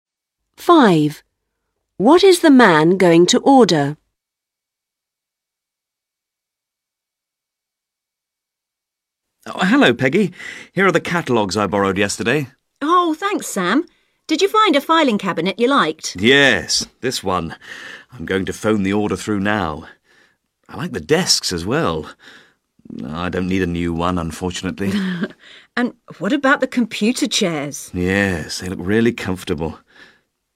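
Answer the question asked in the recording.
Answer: a filing cabinet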